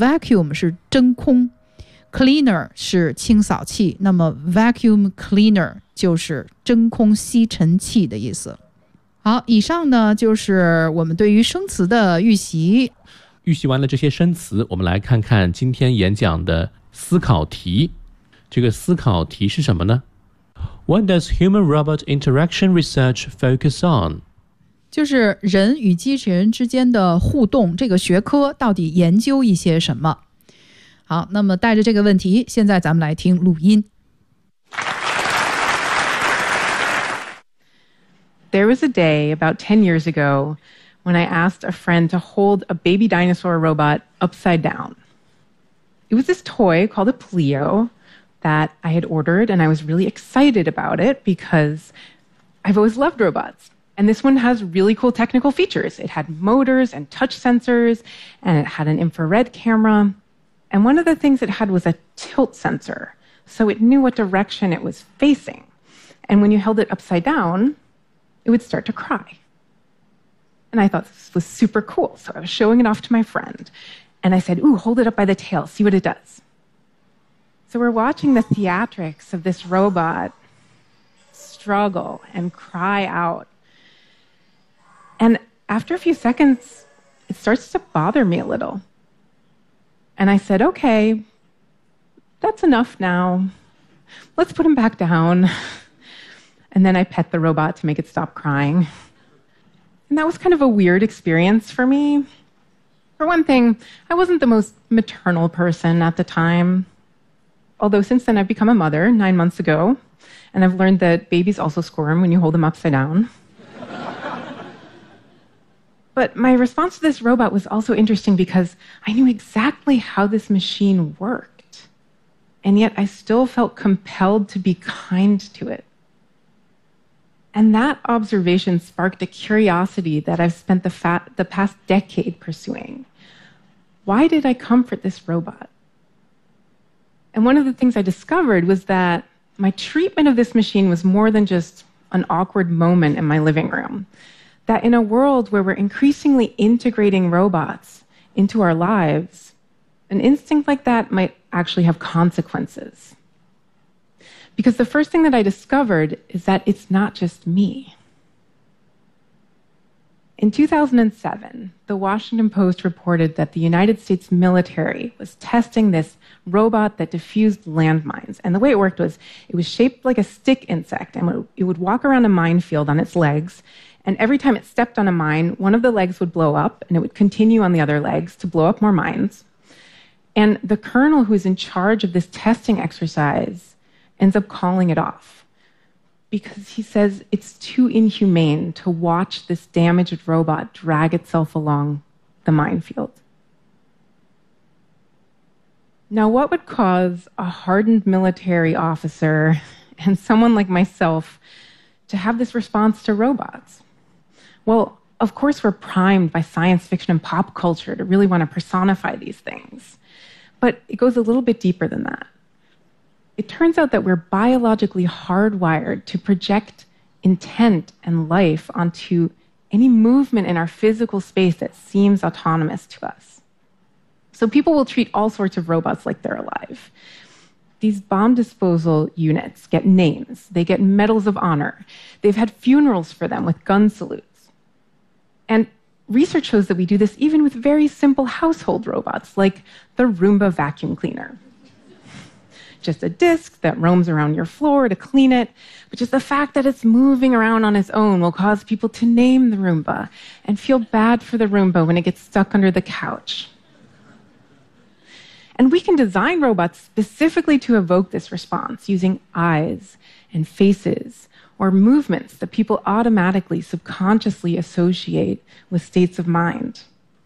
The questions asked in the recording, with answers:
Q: What does human-robot interaction research focus on?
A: 有专门的研究就叫做人与机器人之间的互动。那这个研究呢,就是去显示通过眼神、脸部表情来制作的这个设计的这个机器人到底对于人类的情感有什么样的效果。